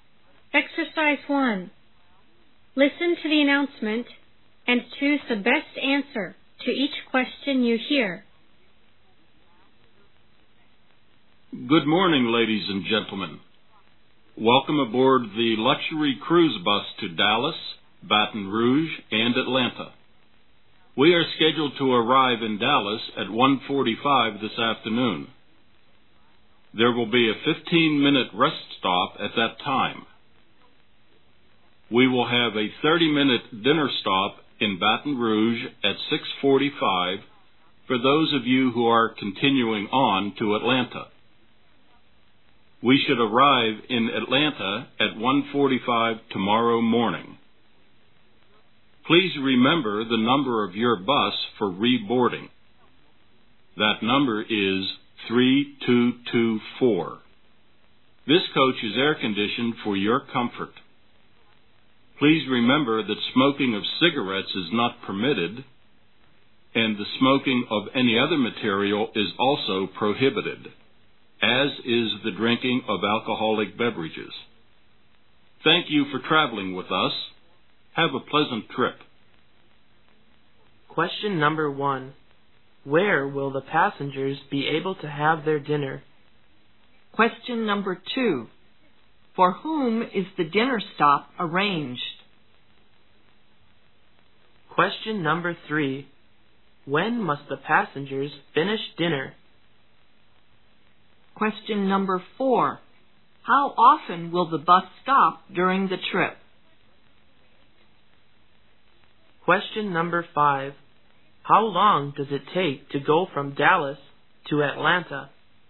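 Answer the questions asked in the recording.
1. In Baton Rouge
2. Passengers continuing on to Atlanta
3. By 7:15
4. Twice
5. 12 hours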